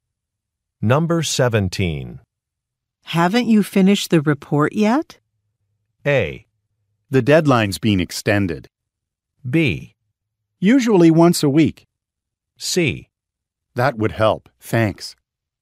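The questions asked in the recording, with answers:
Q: Haven't you finished the report yet?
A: A: The deadline's been extended.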